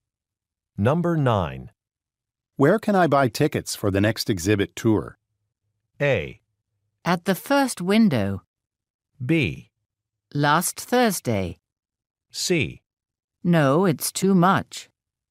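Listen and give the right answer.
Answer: A: At the first window.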